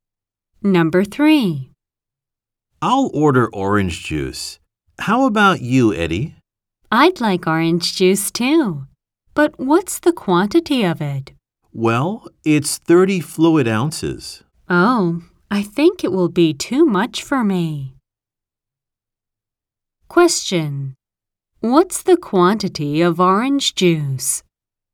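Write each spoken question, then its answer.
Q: What's the quantity of orange juice?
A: 30 fluid ounces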